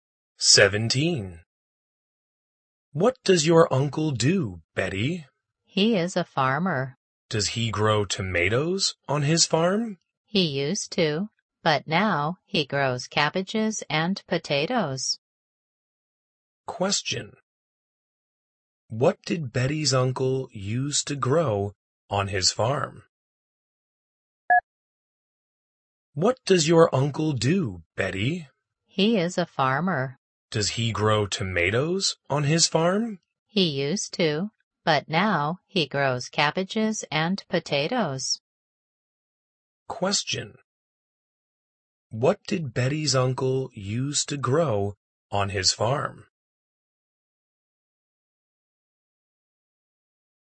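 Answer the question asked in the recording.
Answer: Tomatoes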